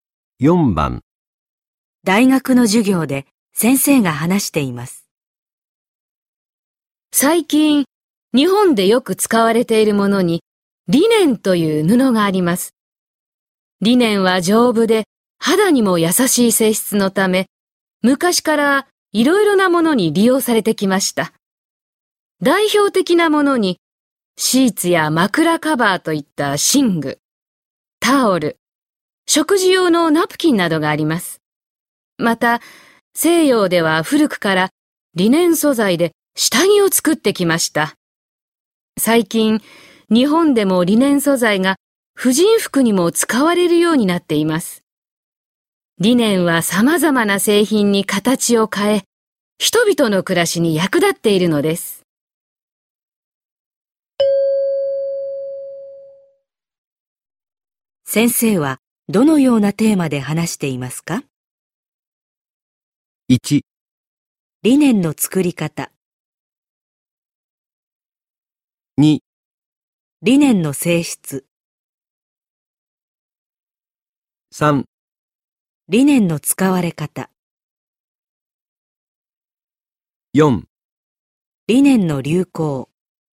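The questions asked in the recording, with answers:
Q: 先生はどのようなテーマで話していますか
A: 3: リネンの使われ方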